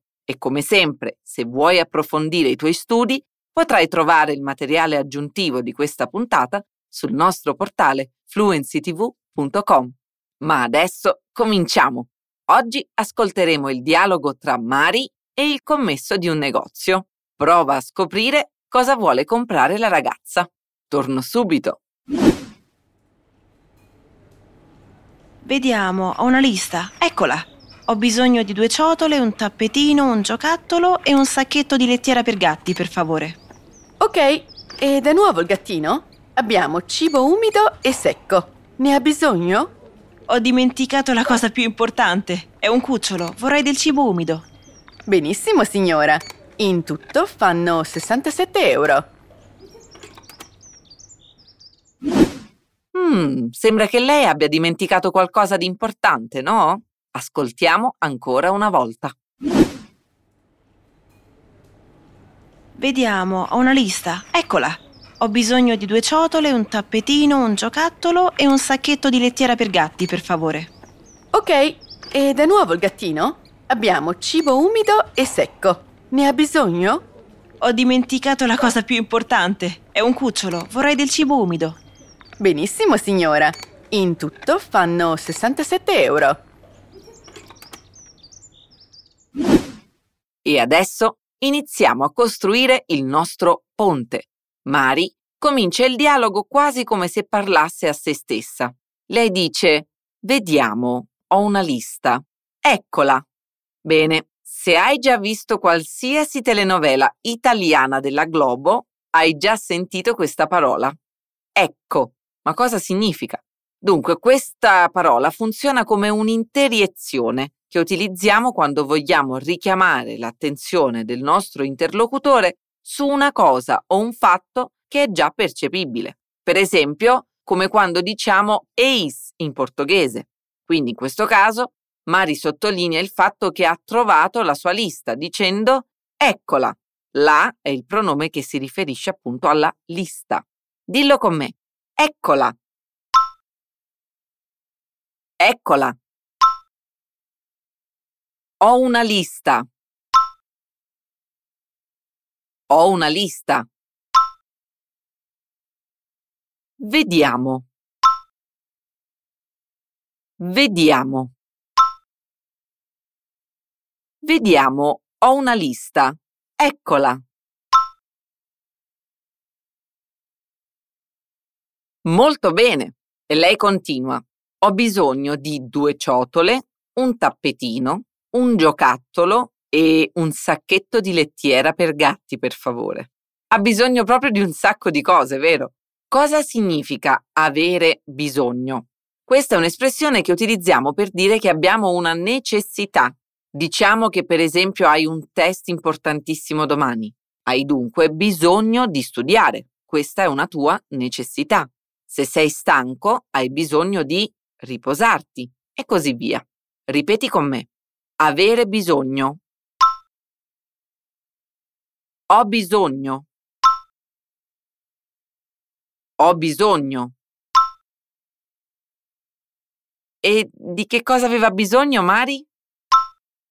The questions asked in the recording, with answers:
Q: E di che cosa aveva bisogno Mari?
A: Eh sì, un sacco di cose. Ha bisogno di due ciotole, un tappetino, un giocattolo e un sacchetto di lettiera per gatti.